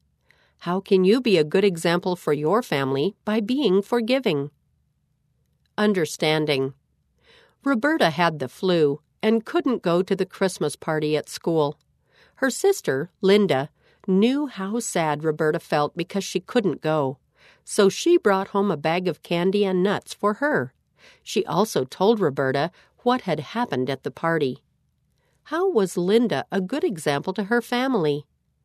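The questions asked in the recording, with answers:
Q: How was Linda a good example to her family?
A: She brought Roberta candy and nuts and told her about the party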